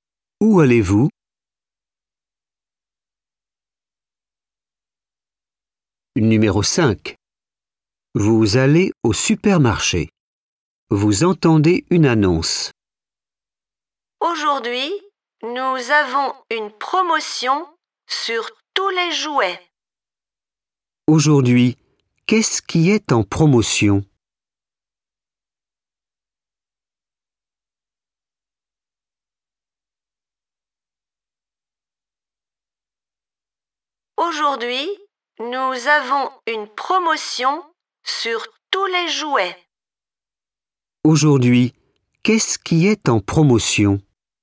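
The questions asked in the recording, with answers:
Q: Aujourd'hui, qu'est-ce qui est en promotion?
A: les jouets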